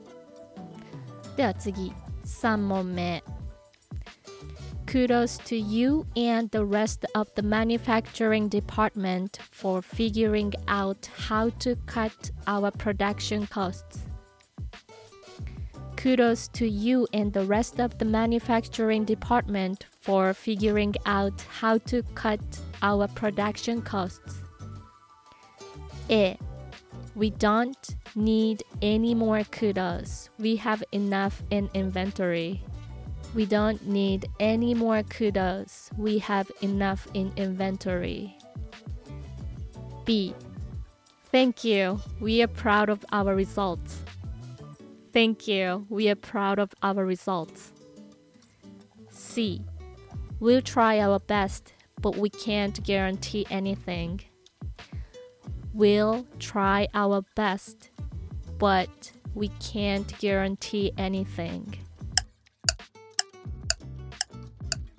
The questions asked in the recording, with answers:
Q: Kudos to you and the rest of the manufacturing department for figuring out how to cut our production costs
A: 正解は B Thank you, we are proud of our results